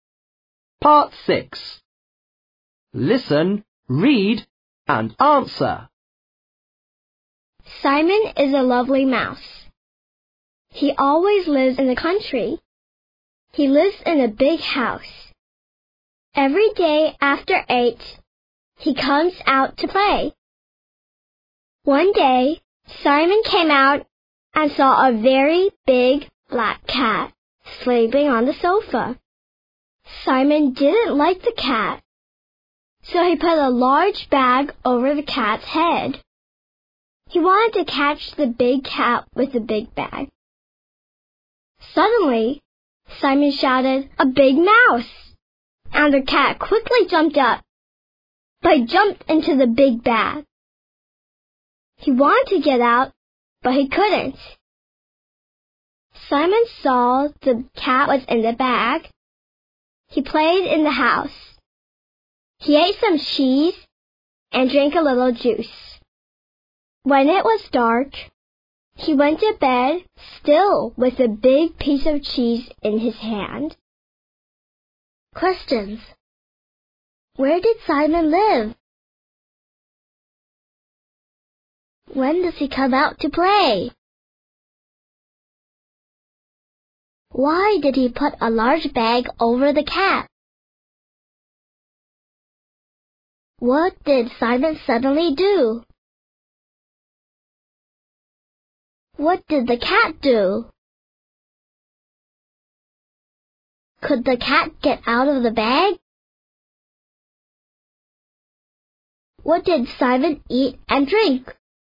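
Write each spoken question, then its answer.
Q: Where did Simon live?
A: In the country, in a big house

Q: When does he come out to play?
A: Every day after 8

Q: Why did he put a large bag over the cat?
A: He didn't like the cat and wanted to catch it

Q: What did Simon suddenly do?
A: He shouted, "A big mouse!"

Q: What did the cat do?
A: It quickly jumped up, right into the big bag

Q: Could the cat get out of the bag?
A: No, it couldn't

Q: What did Simon eat and drink?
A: Some cheese and a little juice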